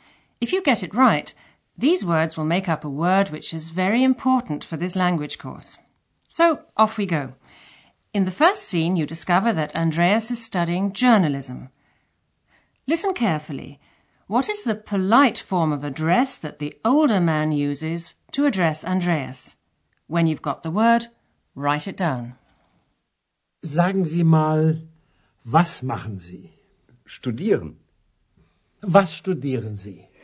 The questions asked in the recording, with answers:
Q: What is the polite form of address that the older man uses to address Andreas?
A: In German, Sie.